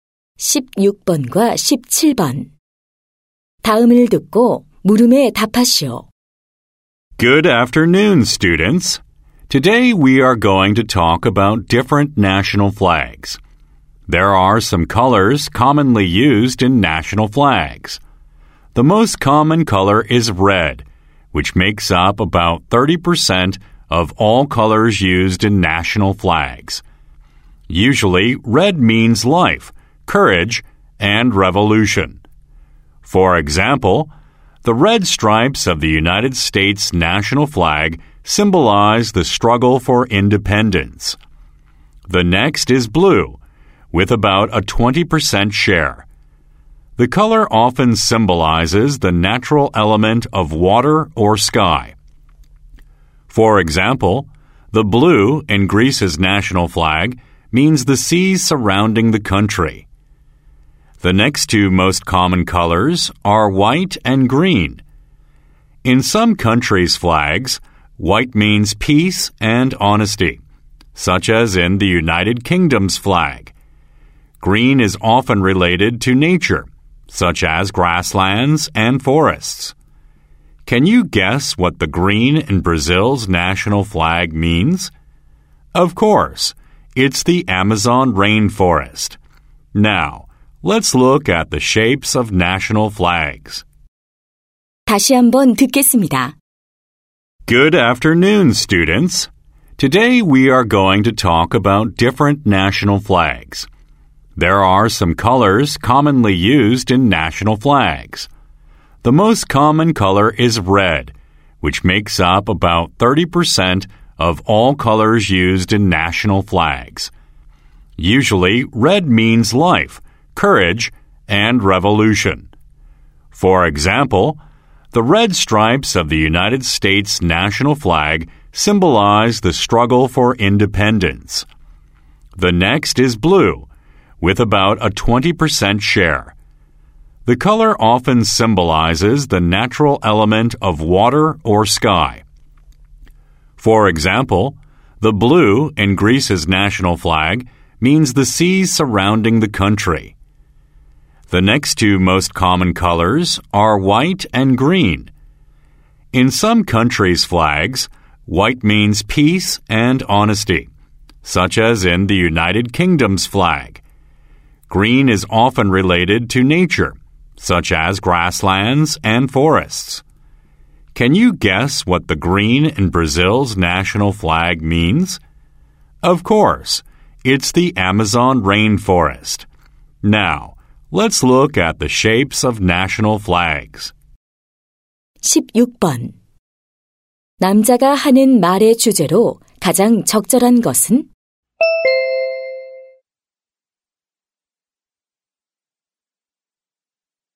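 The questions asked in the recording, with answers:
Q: 남자가 하는 말의 주제로 가장 적절한 것은?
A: 국기에 흔히 쓰이는 색과 그 의미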